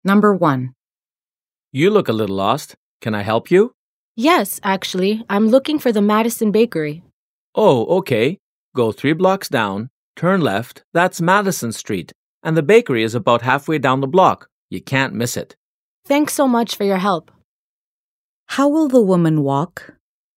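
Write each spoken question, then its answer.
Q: How will the woman walk?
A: Go 3 blocks down, turn left onto Madison Street, and the bakery is about halfway down the block.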